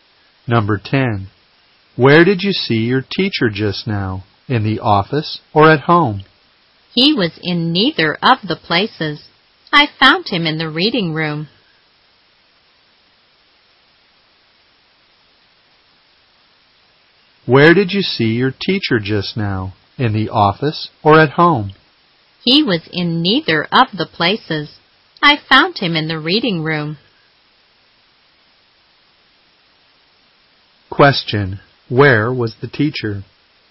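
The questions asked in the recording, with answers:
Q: Where was the teacher?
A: In the reading room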